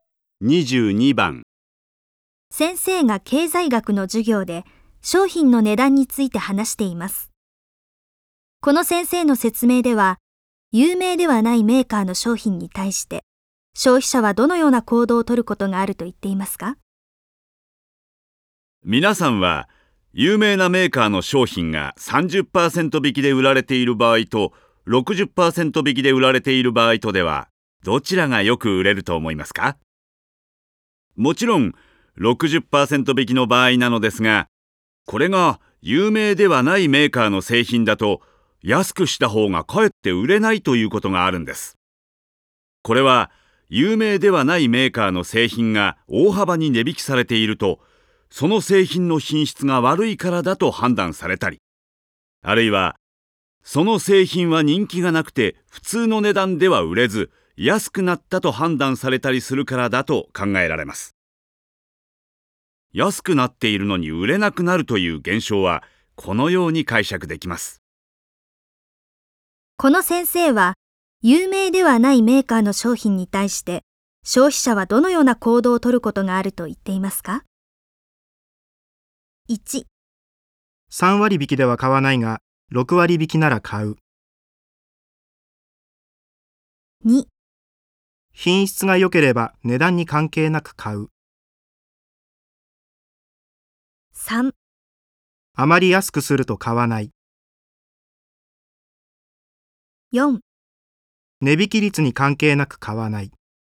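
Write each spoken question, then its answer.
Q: この先生は、有名ではないメーカーの商品に対して消費者はどのような行動を取ることがあると言っていますか?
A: 3: あまり安くすると買わない。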